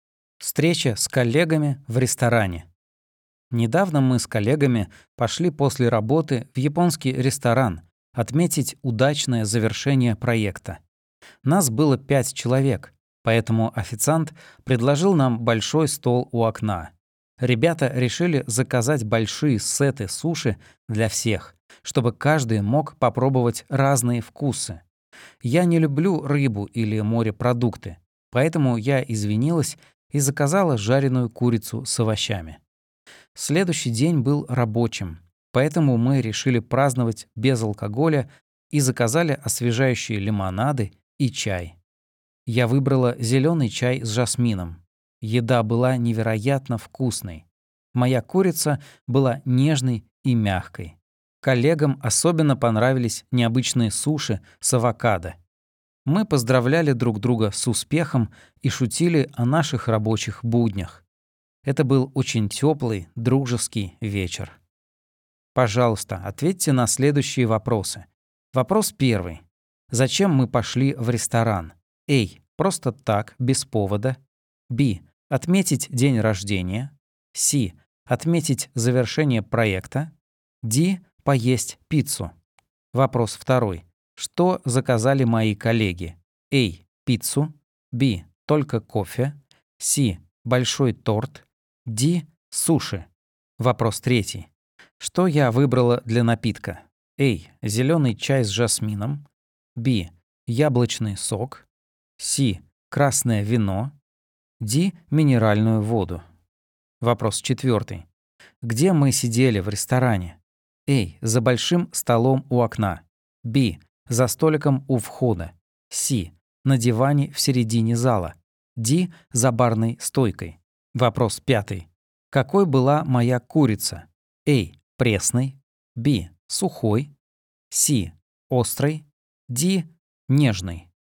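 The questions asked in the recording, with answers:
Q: Зачем мы пошли в ресторан?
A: C: Отметить завершение проекта.

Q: Что заказали мои коллеги?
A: D: Суши.

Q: Что я выбрала для напитка?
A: A: Зеленый чай с жасмином.

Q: Где мы сидели в ресторане?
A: A: За большим столом у окна.

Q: Какой была моя курица?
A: D: Нежной.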